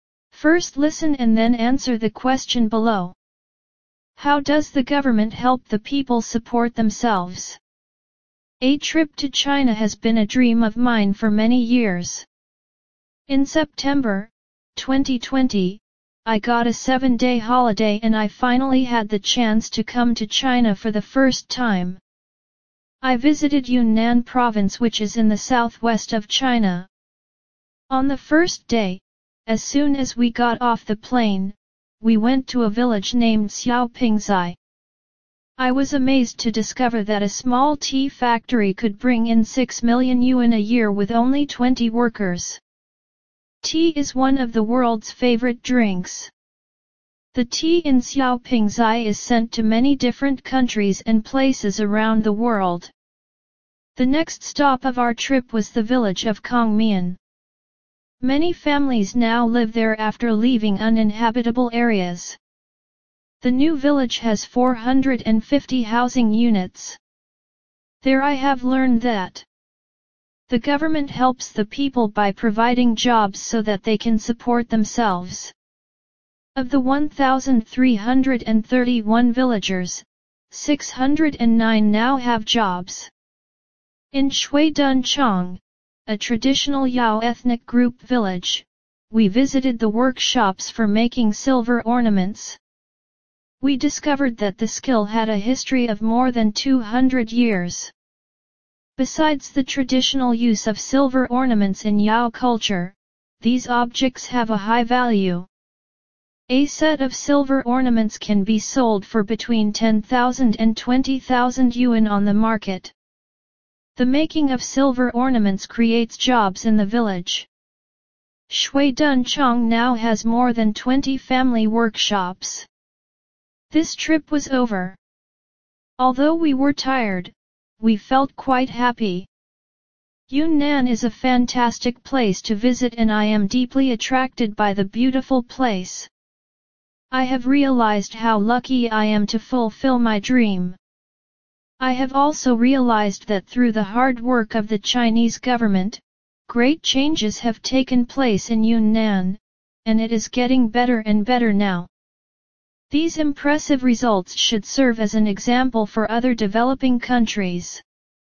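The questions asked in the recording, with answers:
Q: How does the government help the people support themselves?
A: By providing jobs for them.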